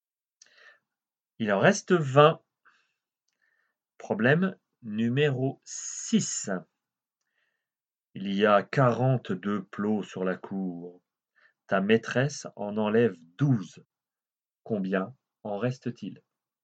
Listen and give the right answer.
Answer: Eh bien, il en reste 30.